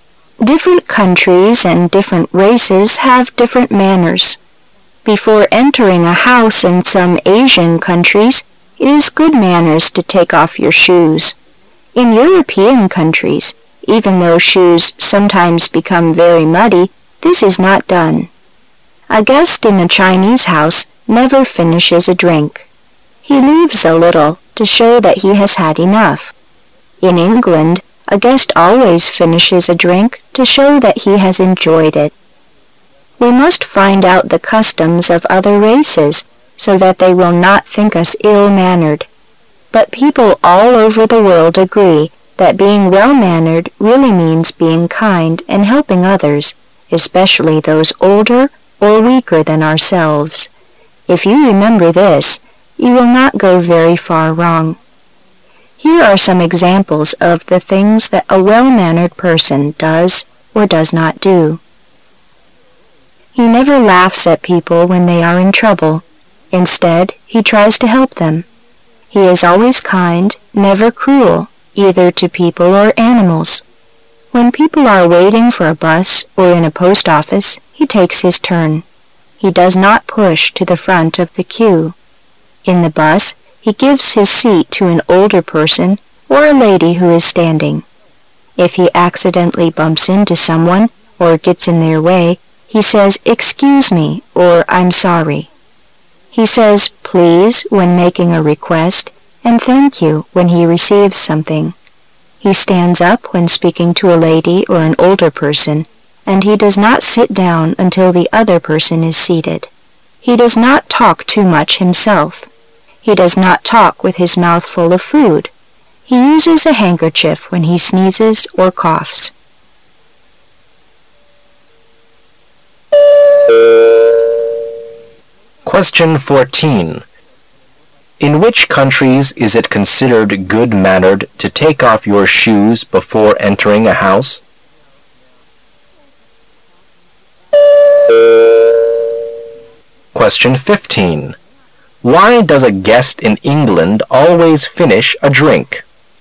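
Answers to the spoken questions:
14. Some Asian countries
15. To show that he has enjoyed it

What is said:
[解析] 14-16 Different countries and different races have different manners. Before entering a house in some Asian countries, it is good manners to take off your shoes. In European countries, even though shoes sometimes become very muddy, this is not done. A guest in a Chinese house never finishes a drink. He leaves a little, to show that he has had enough. In England, a guest always finishes a drink to show that he has enjoyed it. We must find out the customs of other races, so that they will not think us ill-mannered. But people all over the world agree that being well-mannered really means being kind and helping others, especially those older or weaker than ourselves. If you remember this, you will not go very far wrong. Here are some examples of the things that a well-mannered person does or does not do. 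He never laughs at people when they are in trouble. Instead, he tries to help them. He is always kind, never cruel, either to people or animals. When people are waiting for a bus, or in a Post Office, he takes his turn. He does not push to the front of the queue. In the bus, he gives his seat to an older person or a lady who is standing. If he accidentally bumps into someone, or gets in their way, he says "Excuse me" or "I'm sorry" He says "Please" when making a request, and "Thank you" when he receives something. He stands up when speaking to a lady or an older person, and he does not sit down until the other person is seated. He does not talk too much himself. He does not talk with his mouth full of food. He uses a handkerchief when he sneezes or coughs.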